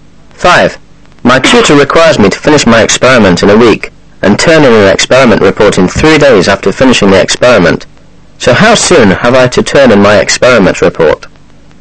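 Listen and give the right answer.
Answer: In 10 days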